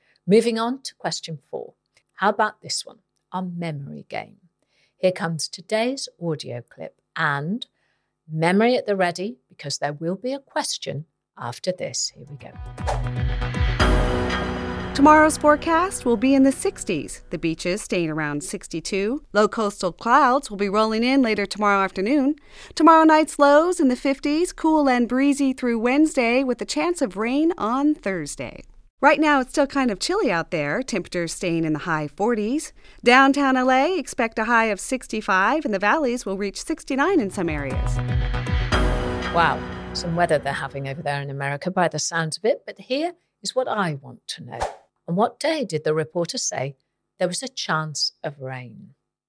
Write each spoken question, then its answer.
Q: On what day did the reporter say there was a chance of rain?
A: And the answer was Thursday.